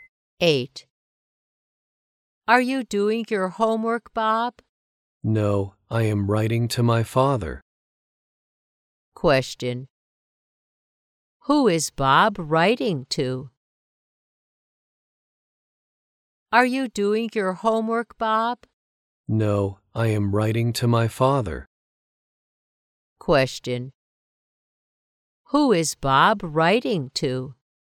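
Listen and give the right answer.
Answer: His father.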